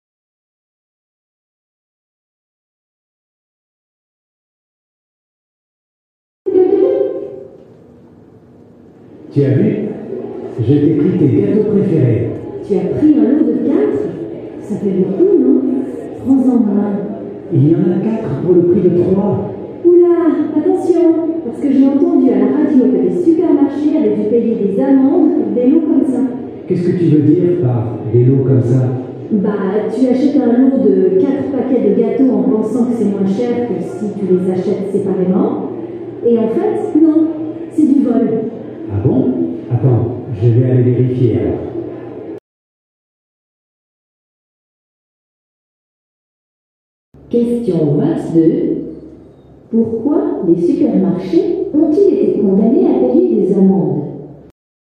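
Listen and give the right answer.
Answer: Les lots n'étaient pas moins chers que les produits achetés séparément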